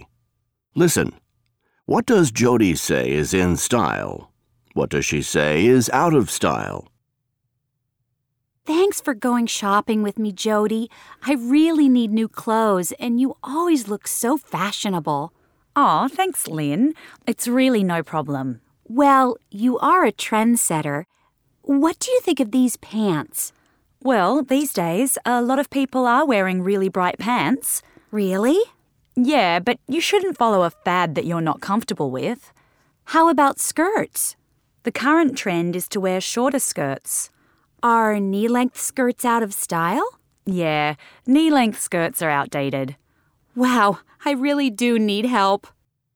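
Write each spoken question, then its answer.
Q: What does Jody say is in style?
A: Really bright pants and shorter skirts

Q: What does she say is out of style?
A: Knee-length skirts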